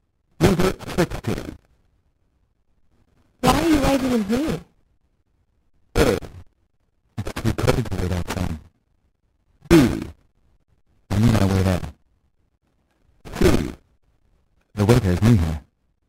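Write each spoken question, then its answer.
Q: Why are you waiting in here?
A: A: It's too cold to wait outside.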